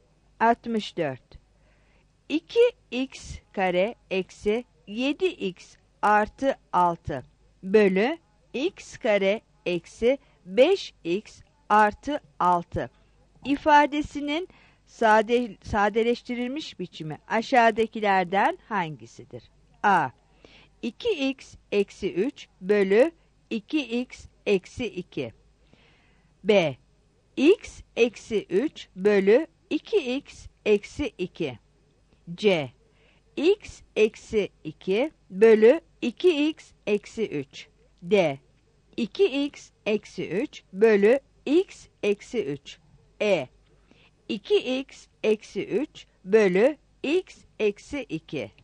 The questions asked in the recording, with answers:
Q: 2x kare eksi 7x artı 6 bölü x kare eksi 5x artı 6 ifadesinin sadeleştirilmiş biçimi aşağıdakilerden hangisidir?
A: 64 D